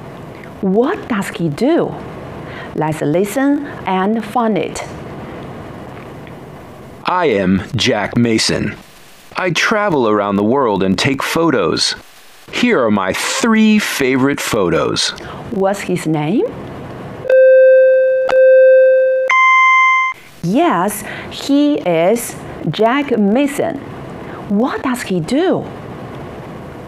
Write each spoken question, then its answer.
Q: What does he do?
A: He travels around the world and takes photos.